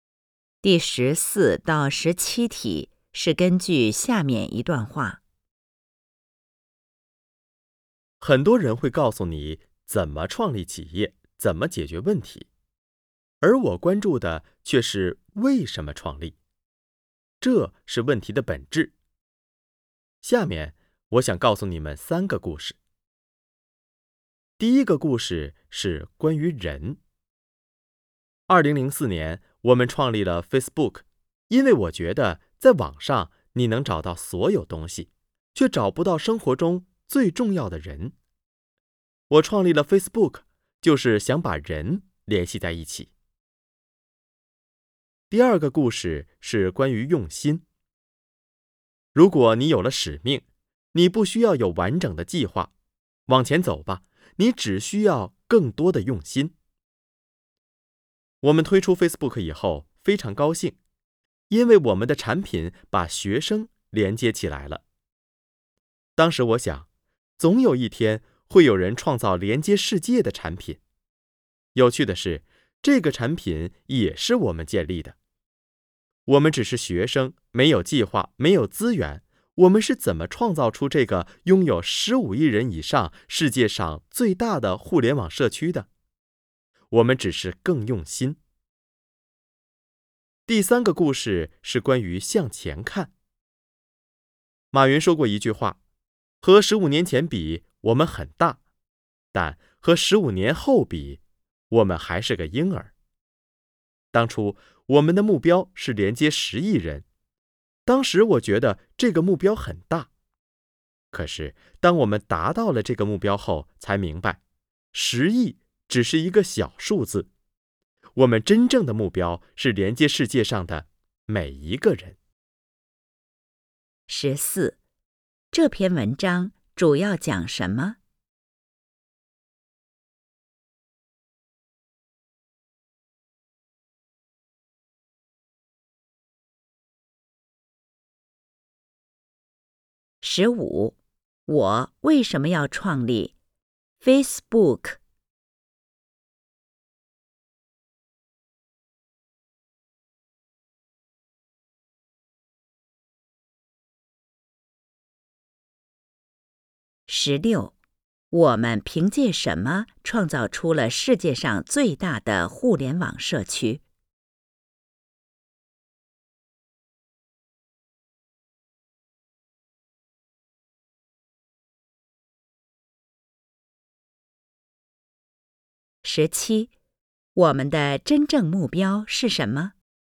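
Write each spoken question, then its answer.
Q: 十五,我为什么要创立 Facebook?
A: 想把人联系在一起

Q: 十六, 我们凭借什么创造出了世界上最大的互联网社区?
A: 更用心

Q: 17,我们的真正目标是什么?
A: 连接世界上的每一个人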